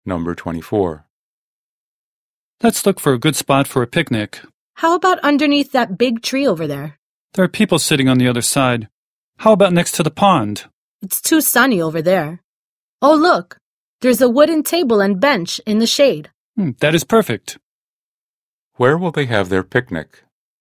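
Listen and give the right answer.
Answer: At the wooden table and bench in the shade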